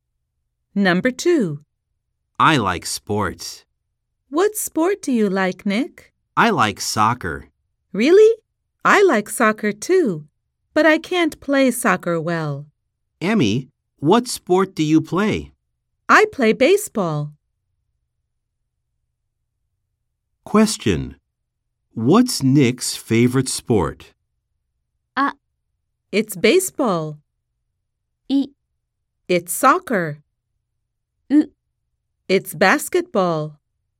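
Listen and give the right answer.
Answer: B: It's soccer.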